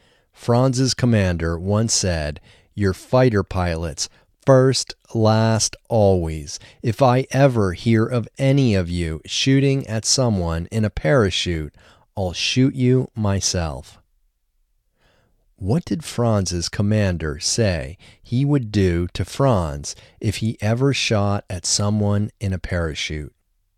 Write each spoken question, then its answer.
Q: What did Franz's commander say he would do to Franz if he ever shot at someone in a parachute?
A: Franz's commander said he would shoot Franz if he ever shot at someone in a parachute.